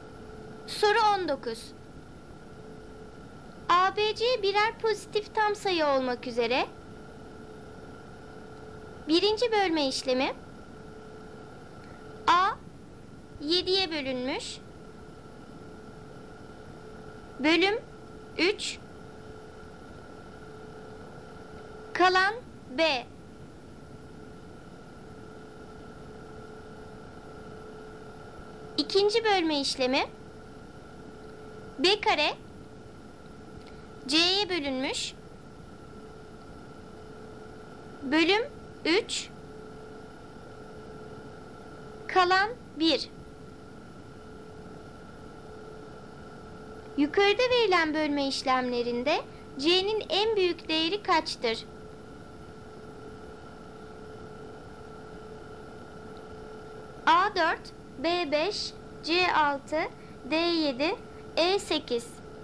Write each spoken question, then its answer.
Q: Yukarıda verilen bölme işlemlerinde C'nin en büyük değeri kaçtır?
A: Doğru cevap E 8.